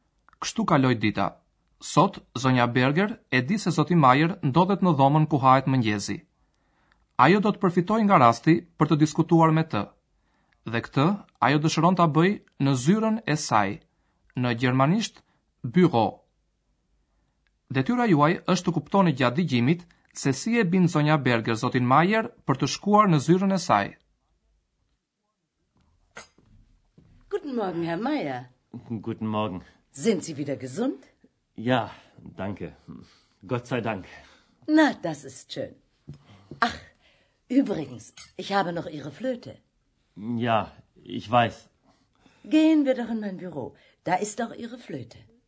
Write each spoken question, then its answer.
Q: detyra juaj është të kuptoni gjatë digjimit se si e bin zonja Berger, zotin Majer, për të shkuar në zyrën e saj.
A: Me siguri e kuptuat që zonja Berger e fton zotin Majer në zyrën e saj për t'i dhënë flautin.